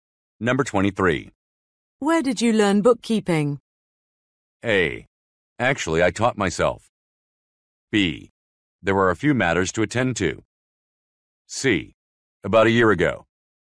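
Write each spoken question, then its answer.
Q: Where did you learn bookkeeping?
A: A: Actually, I taught myself.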